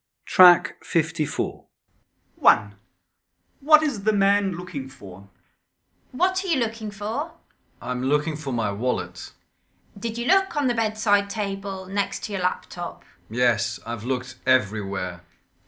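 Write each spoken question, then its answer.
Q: What is the man looking for?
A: His wallet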